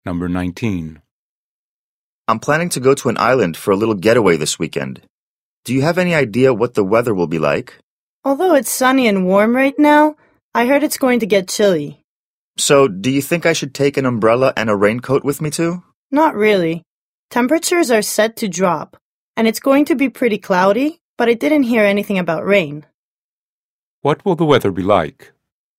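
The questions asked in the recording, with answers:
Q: What will the weather be like?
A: Chilly and cloudy, with no rain expected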